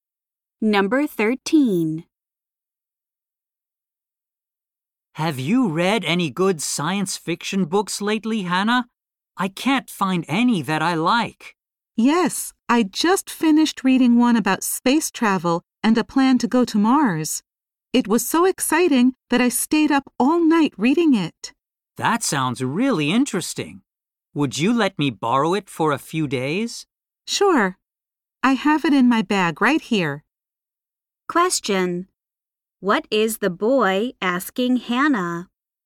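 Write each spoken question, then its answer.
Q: What is the boy asking Hannah?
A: To lend him her science fiction book for a few days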